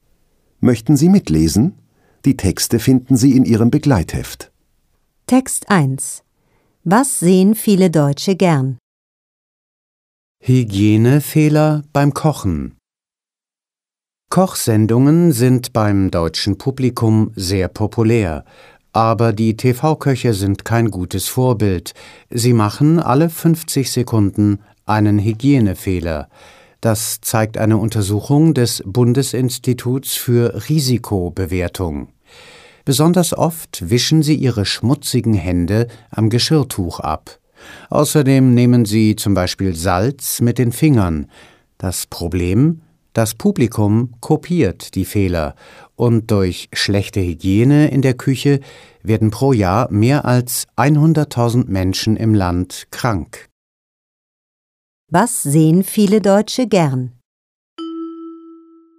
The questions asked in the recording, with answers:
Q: Was sehen viele Deutsche gern?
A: Sie sehen gern Kochsendungen.